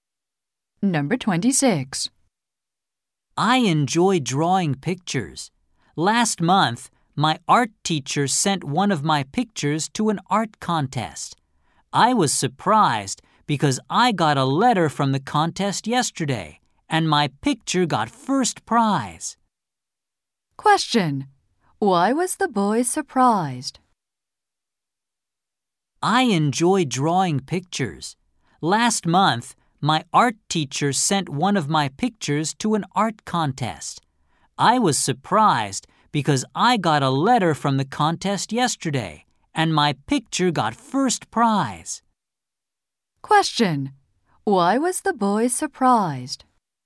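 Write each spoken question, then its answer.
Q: Why was the boy surprised?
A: His picture won first prize in an art contest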